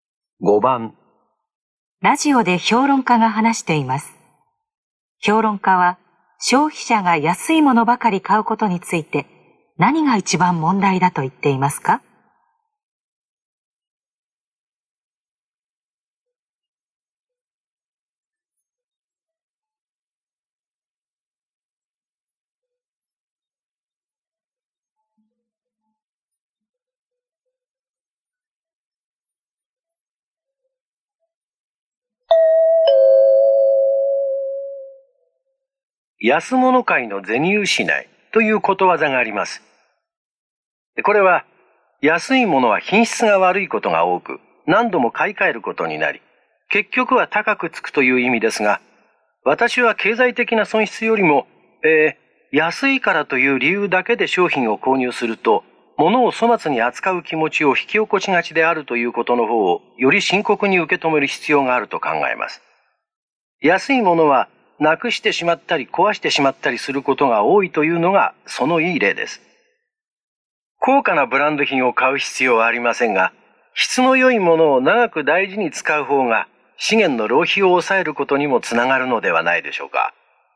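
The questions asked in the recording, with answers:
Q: 評論家は消費者が安いものばかり買うことについて何が一番問題だと言っていますか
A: 物を粗末に扱う気持ちを引き起こしがちなこと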